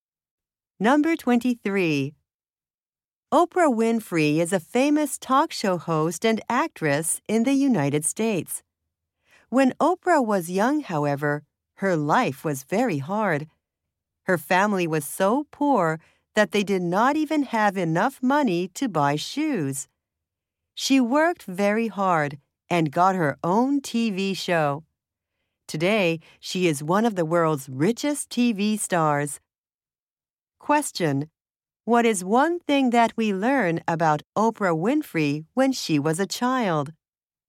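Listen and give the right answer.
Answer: Her family was too poor to buy shoes.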